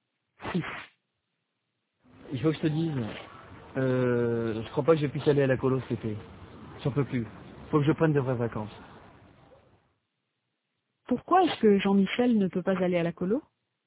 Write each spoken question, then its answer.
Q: Pourquoi est-ce que Jean-Michel ne peut pas aller à la colo?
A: Parce qu'il n'en peut plus.